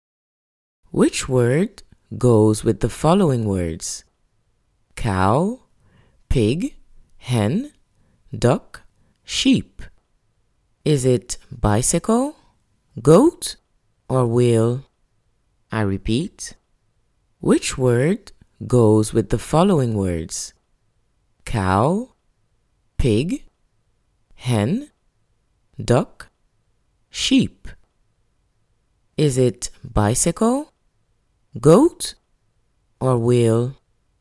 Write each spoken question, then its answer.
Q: Which word goes with the following words?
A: So, goat is the word that goes with the list.